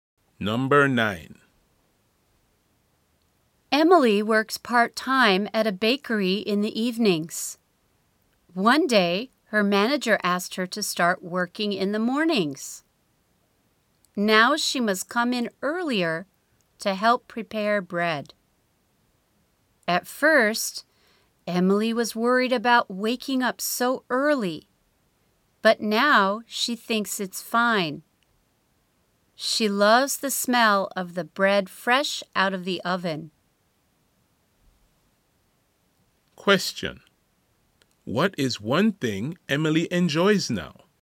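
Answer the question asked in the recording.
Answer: The smell of bread fresh out of the oven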